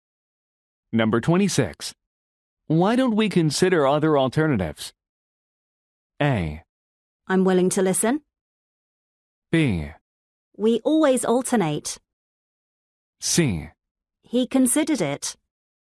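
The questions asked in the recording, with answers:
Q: Why don't we consider other alternatives?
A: A: I'm willing to listen.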